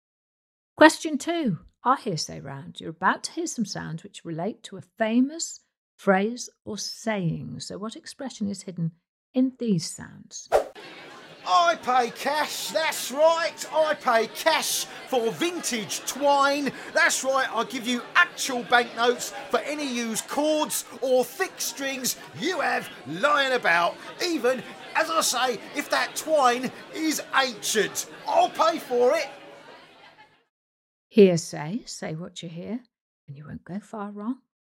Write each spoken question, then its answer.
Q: So what expression is hidden in these sounds?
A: The answer was money for old rope.